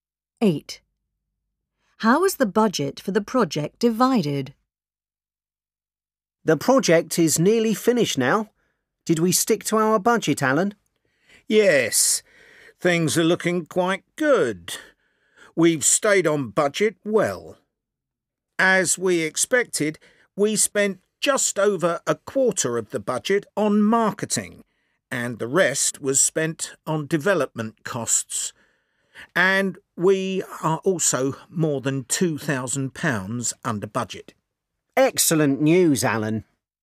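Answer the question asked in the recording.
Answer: Just over a quarter on marketing, the rest on development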